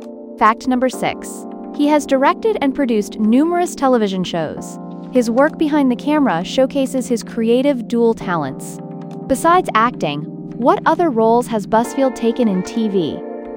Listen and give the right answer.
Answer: Correct answer, directed and produced.